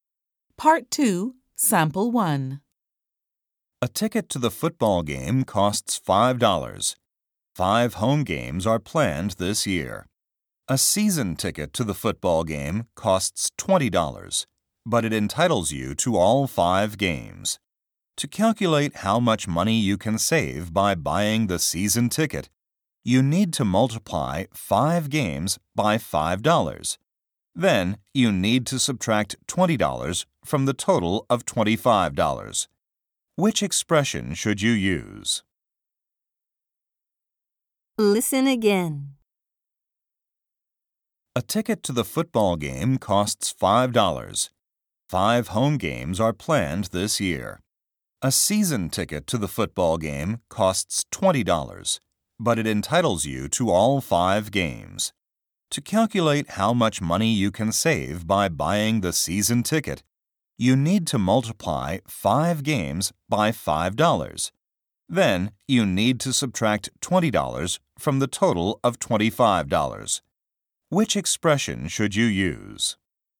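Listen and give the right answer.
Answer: (5 × 5) − 20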